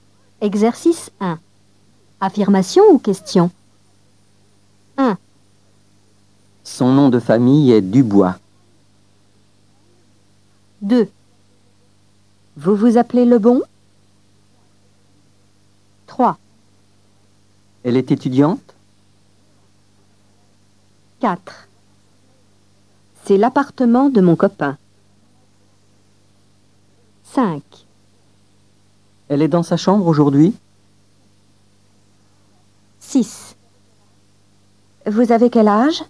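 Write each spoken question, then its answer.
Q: Affirmation ou question ?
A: affirmation

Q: Affirmation ou question ?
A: question

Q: Affirmation ou question ?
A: question

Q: Affirmation ou question ?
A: affirmation

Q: Affirmation ou question ?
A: question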